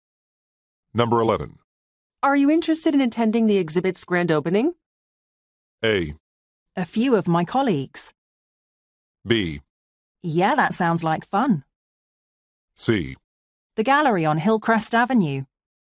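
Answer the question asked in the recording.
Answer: B: Yeah, that sounds like fun.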